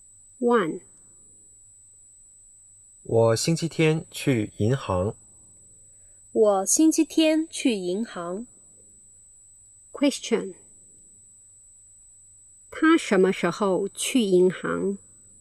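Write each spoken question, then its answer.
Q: 他什么时候去银行?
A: 星期天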